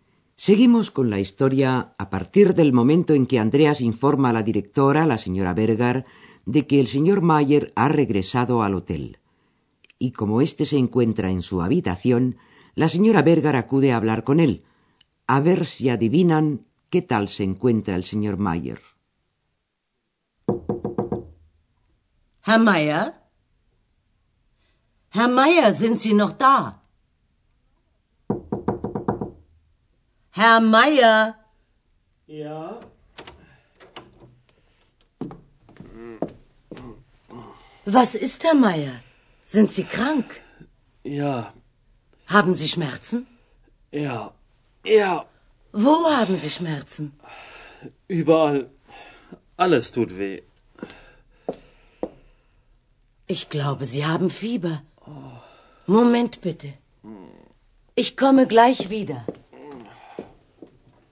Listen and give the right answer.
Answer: lo que pasa es que está enfermo.